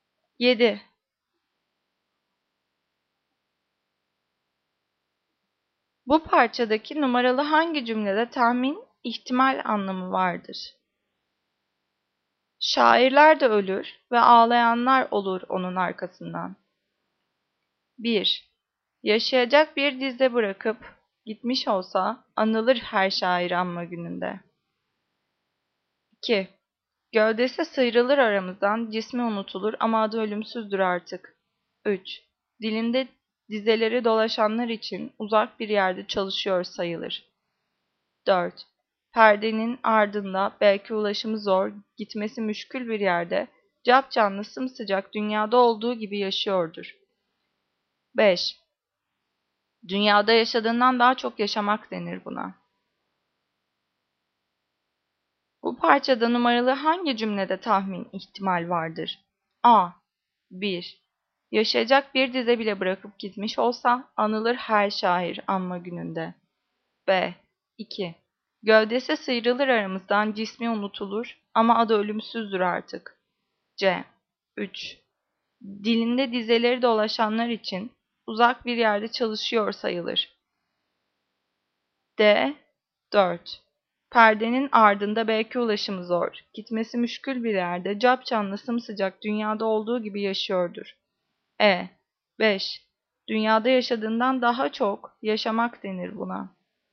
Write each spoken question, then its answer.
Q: Bu parçadaki numaralı hangi cümlede tahmin, ihtimal anlamı vardır?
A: Cevap D. 4. Perdenin ardında belki ulaşımı zor, gitmesi müşkül bir yerde, cap canlı, sımsıcak, dünyada olduğu gibi yaşıyordur.